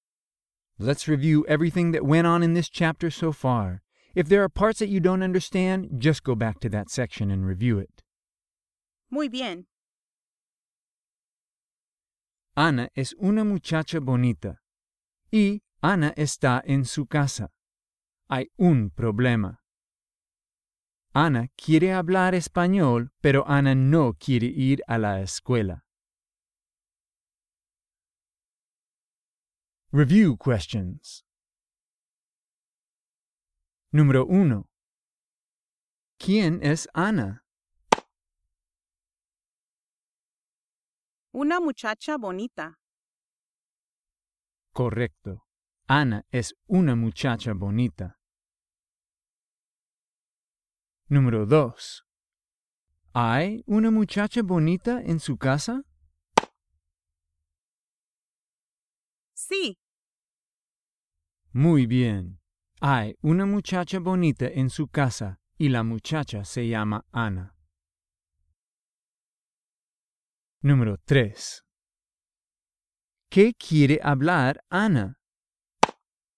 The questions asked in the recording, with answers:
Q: ¿Quién es Ana?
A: Una muchacha bonita.

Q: ¿Hay una muchacha bonita en su casa?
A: Sí.

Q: ¿Qué quiere hablar Ana?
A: El español.